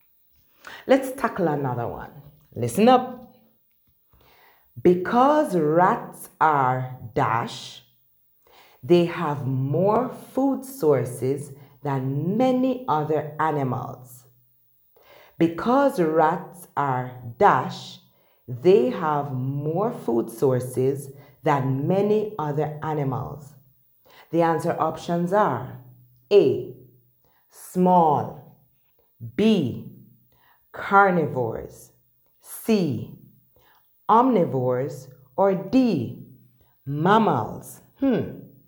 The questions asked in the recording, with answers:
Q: Because rats are dash, they have more food sources than many other animals.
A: because rats are omnivores, they have more food sources than many other animals.